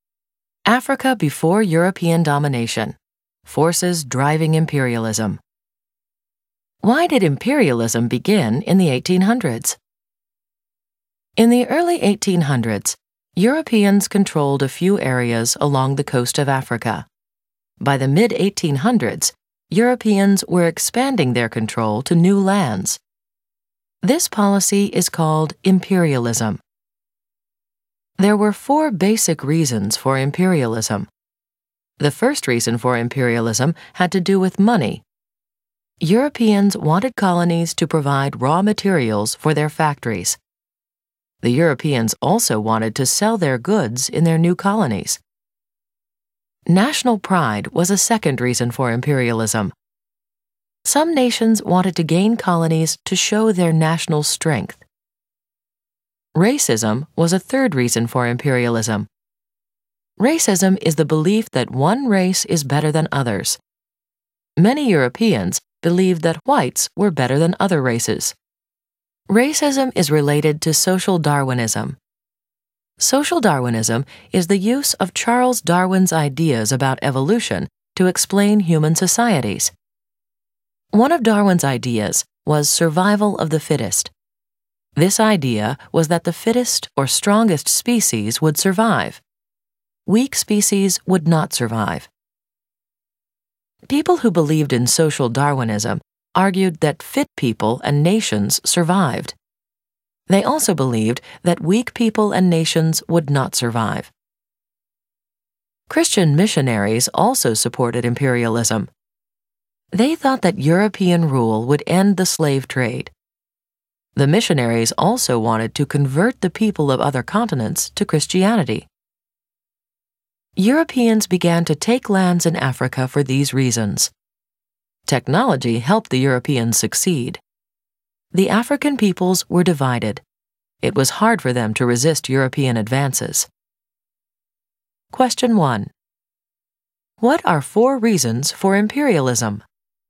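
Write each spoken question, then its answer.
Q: What are four reasons for imperialism?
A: Money (raw materials and markets), national pride, racism/social Darwinism, and missionary goals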